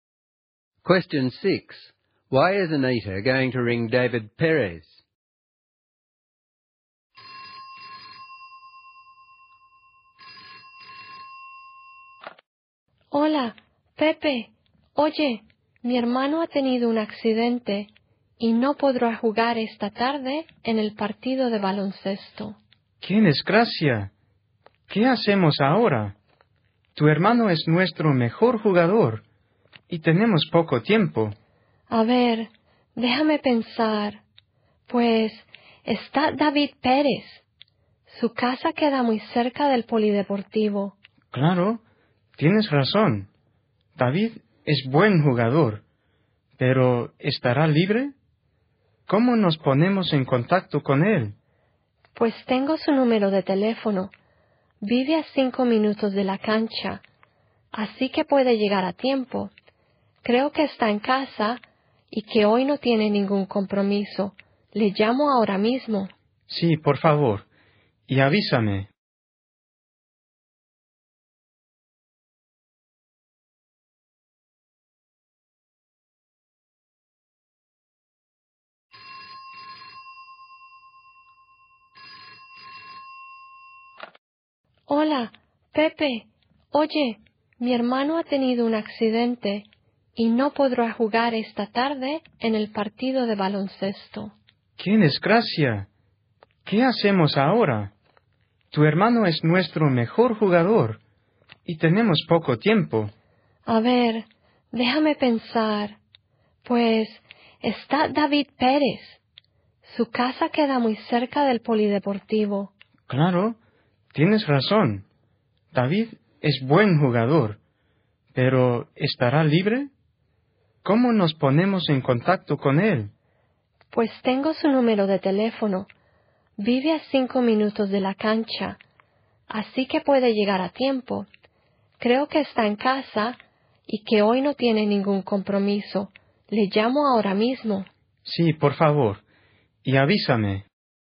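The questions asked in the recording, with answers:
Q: Why is Anita going to ring David Perez?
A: To ask him to replace her injured brother in this afternoon's basketball game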